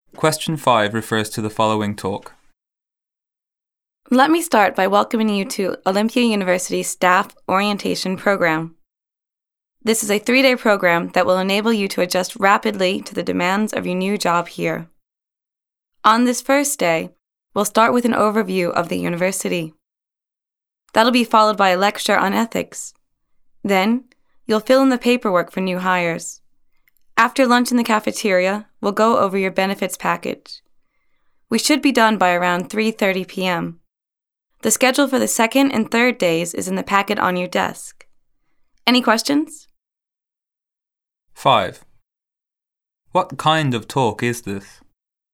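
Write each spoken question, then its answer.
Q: What kind of talk is this?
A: A staff orientation for new university employees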